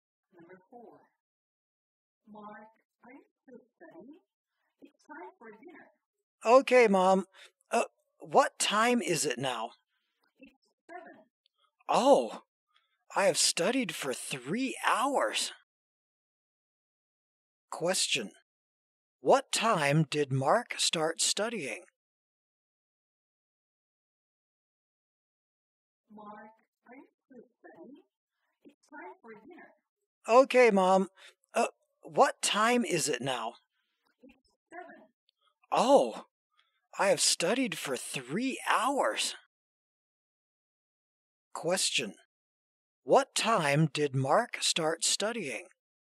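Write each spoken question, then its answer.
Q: What time did Mark start studying?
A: At 4 o'clock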